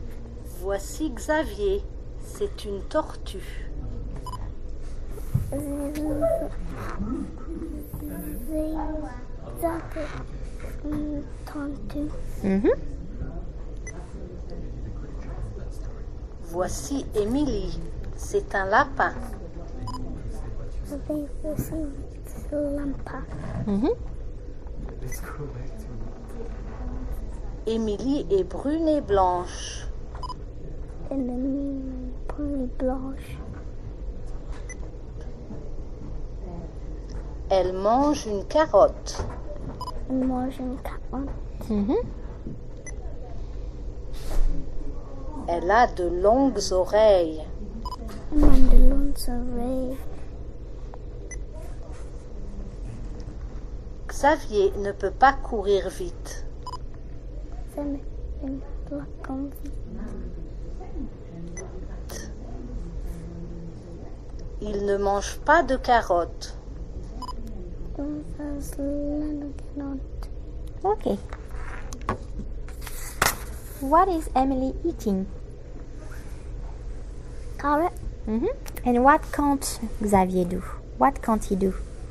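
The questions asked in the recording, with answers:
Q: What is Emily eating?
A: A carrot

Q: And what can't Xavier do?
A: Run fast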